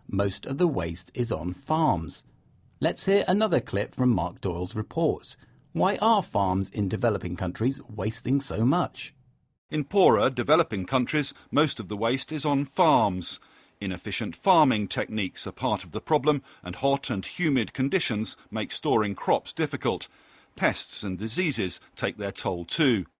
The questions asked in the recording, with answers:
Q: Why are farms in developing countries wasting so much?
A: So farms in developing countries use inefficient farming techniques, which lead to waste.